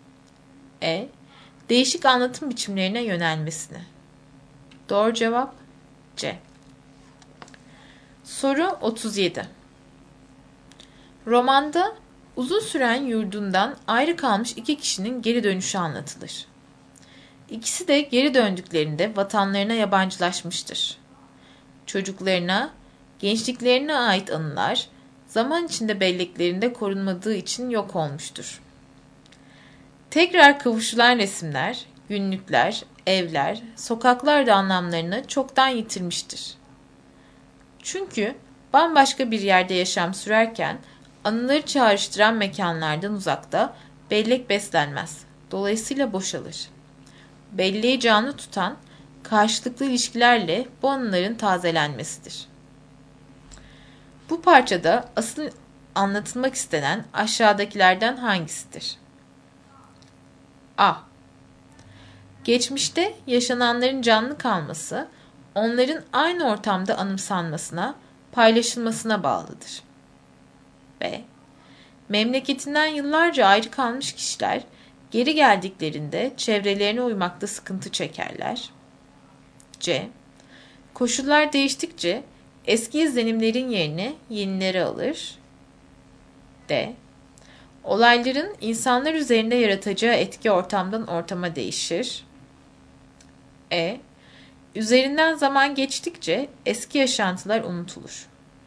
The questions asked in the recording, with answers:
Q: Bu parçada asıl anlatılmak istenen aşağıdakilerden hangisidir?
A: Doğru cevap A.